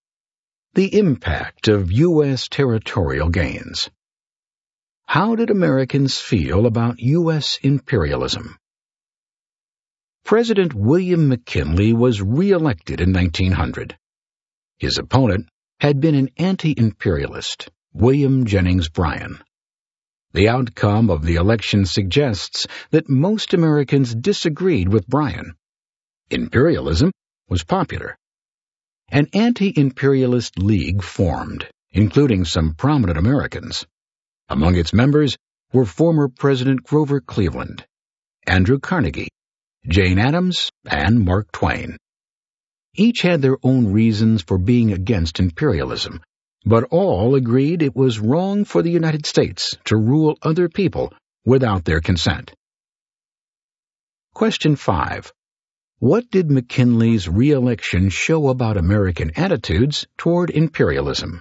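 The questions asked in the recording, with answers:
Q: What did McKinley's re-election show about American attitudes toward imperialism?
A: Most Americans supported imperialism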